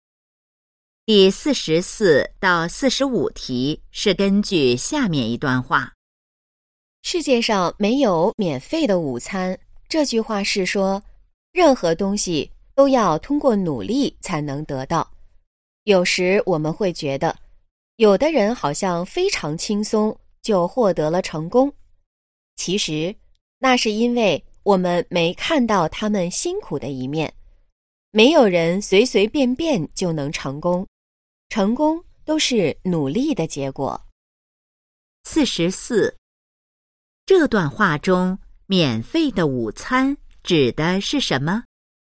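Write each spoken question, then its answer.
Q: 这段话中免费的午餐指的是什么?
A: 不用努力就能得到的东西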